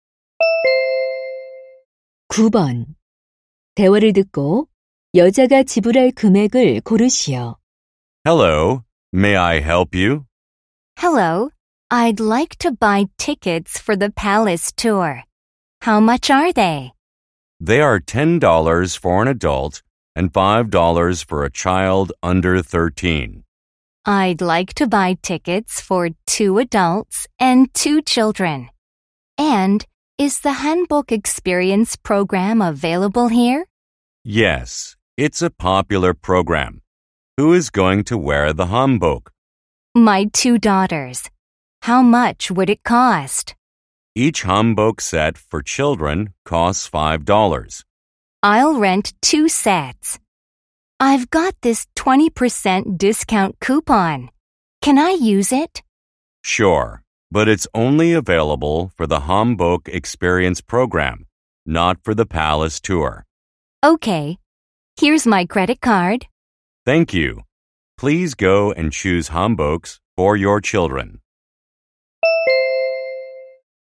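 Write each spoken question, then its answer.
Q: 대화를 듣고 여자가 지불할 금액을 고르시오.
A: $38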